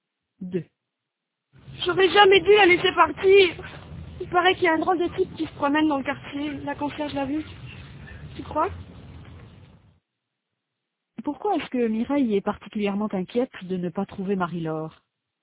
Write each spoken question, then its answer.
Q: Pourquoi est-ce que Mireille est particulièrement inquiète de ne pas trouver Marie-Laure?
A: Parce qu'il paraît qu'il y a un drôle de type qui se promène dans le quartier.